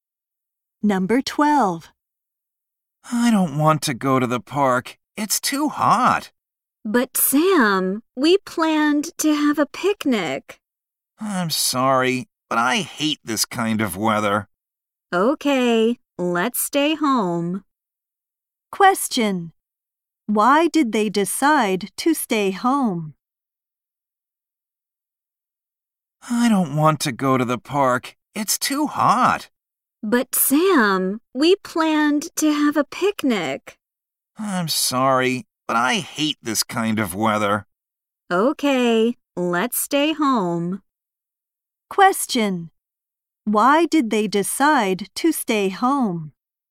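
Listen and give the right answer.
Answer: Because it's too hot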